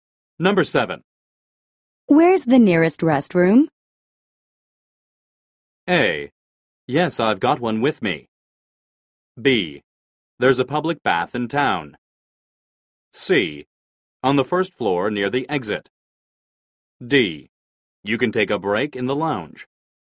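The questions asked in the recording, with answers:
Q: Where's the nearest restroom?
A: C: On the first floor near the exit.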